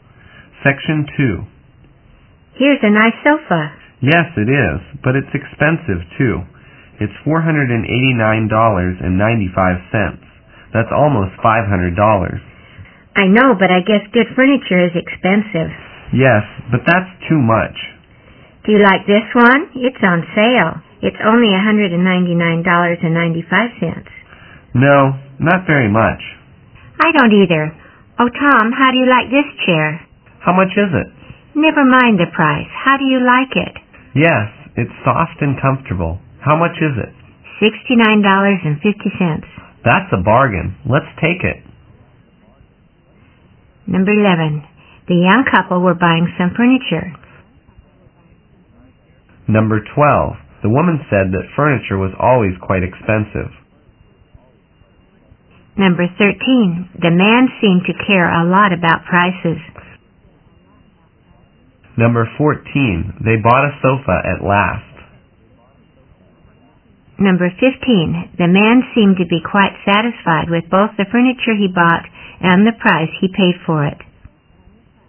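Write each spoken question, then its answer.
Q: The young couple were buying some furniture.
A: True

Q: The man seemed to care a lot about prices.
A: True

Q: They bought a sofa at last.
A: False

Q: The man seemed to be quite satisfied with both the furniture he bought and the price he paid for it.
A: True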